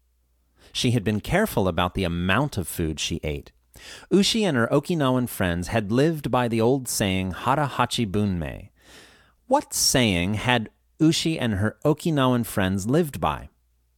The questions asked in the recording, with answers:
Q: What saying had Ushi and her Okinawan friends lived by?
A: They had lived by the old saying, Hara Hachi Bunmei.